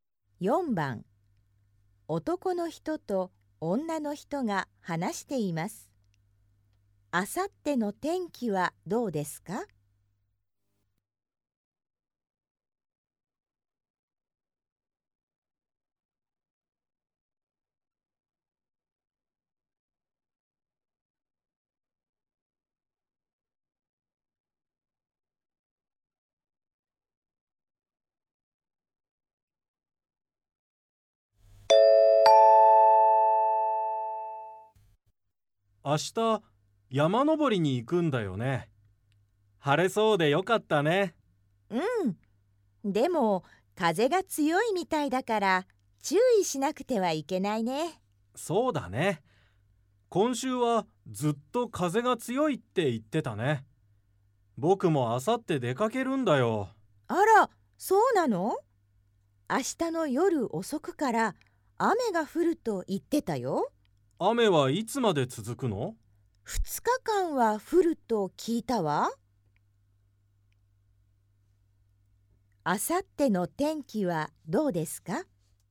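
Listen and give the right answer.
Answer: 雨で、風が強い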